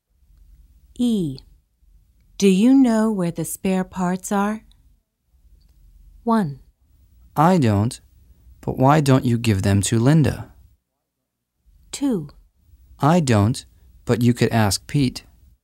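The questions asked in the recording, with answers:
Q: Do you know where the spare parts are?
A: 2: I don't, but you could ask Pete.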